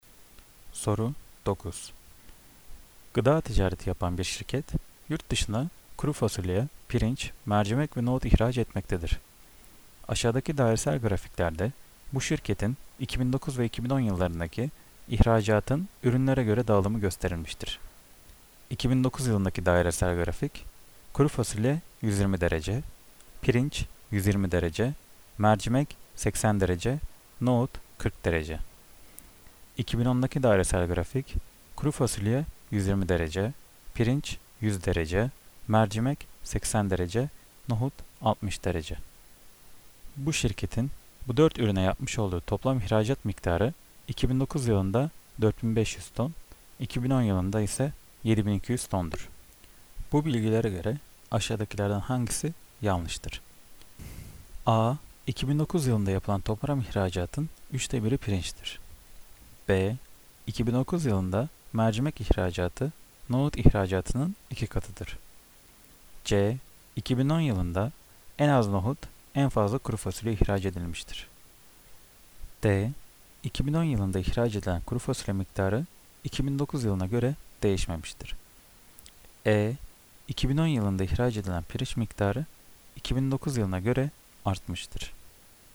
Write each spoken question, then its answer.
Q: Bu bilgilere göre aşağıdakilerden hangisi yanlıştır?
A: Cevap D. 2010 yılında ihraç edilen kuru fasulye miktarı 2009 yılına göre değişmemiştir.